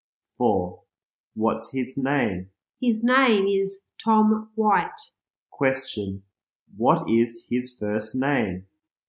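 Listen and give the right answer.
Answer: Tom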